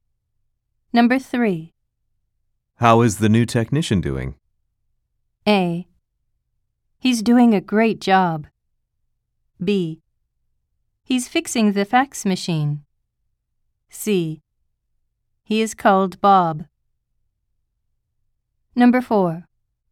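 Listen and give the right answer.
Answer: A: He's doing a great job.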